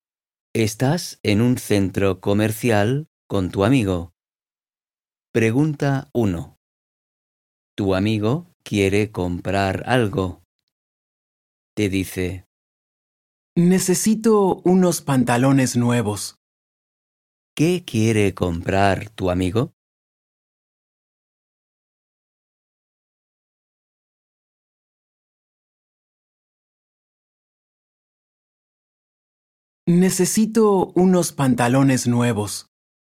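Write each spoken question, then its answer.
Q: ¿Qué quiere comprar tu amigo?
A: unos pantalones nuevos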